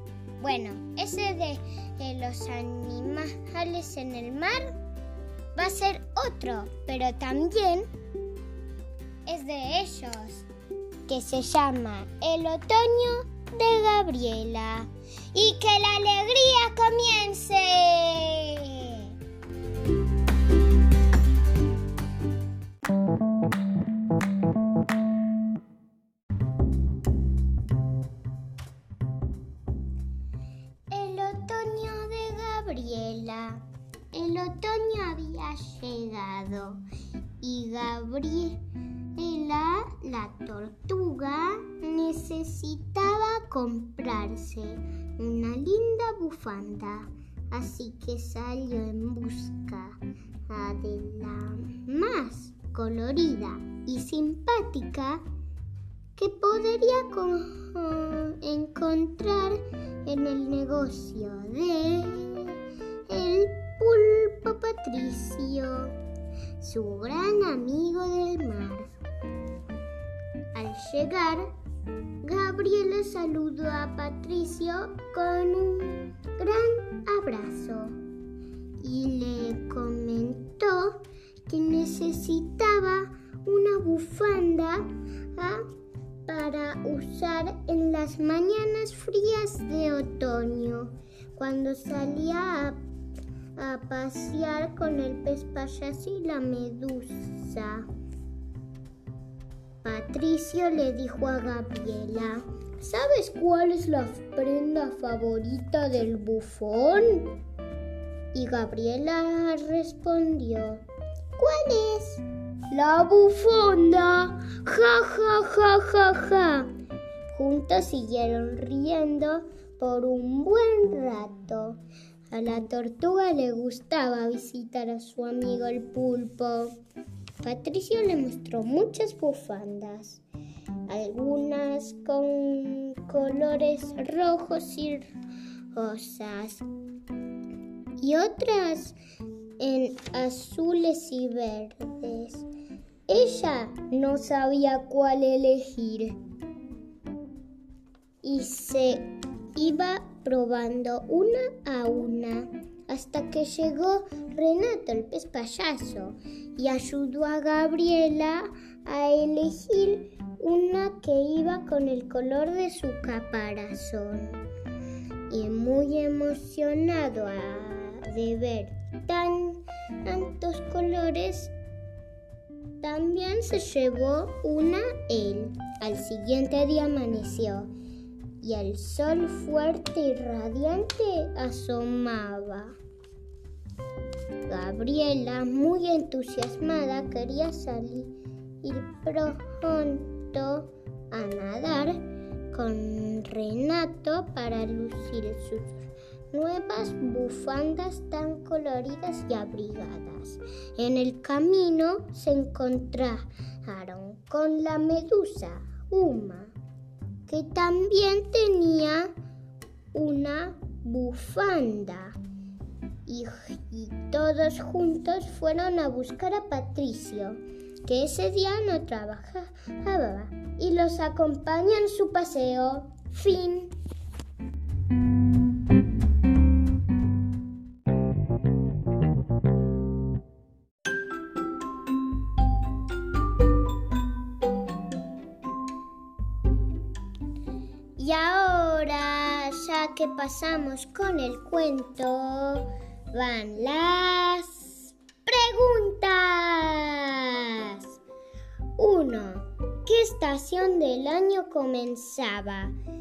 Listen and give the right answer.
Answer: claro, también estamos en otoño.